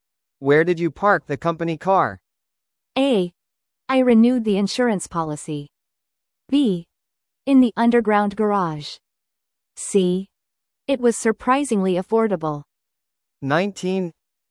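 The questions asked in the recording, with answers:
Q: Where did you park the company car?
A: B: In the underground garage.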